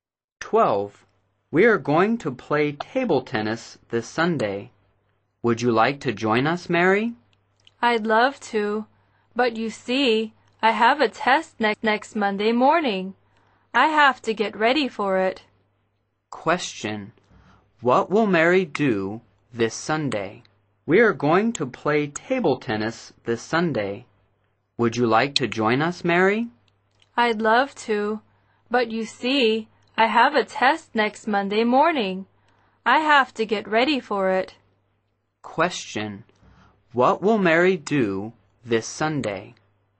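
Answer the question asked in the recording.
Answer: Get ready for her test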